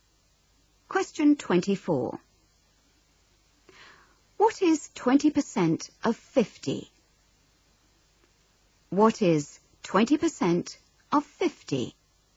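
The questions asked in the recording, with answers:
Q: What is 20% of 50?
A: 10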